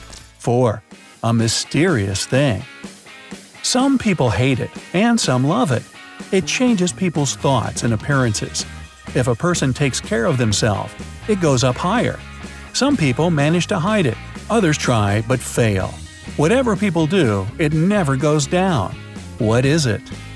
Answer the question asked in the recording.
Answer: It's age.